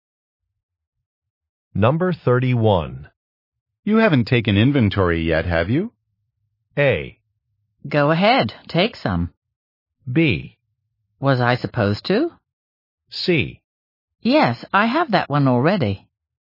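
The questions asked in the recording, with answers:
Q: You haven't taken inventory yet, have you?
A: B: Was I supposed to?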